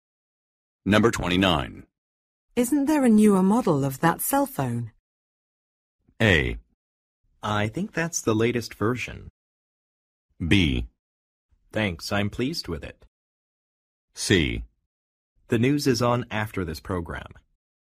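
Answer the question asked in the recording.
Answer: A: I think that's the latest version.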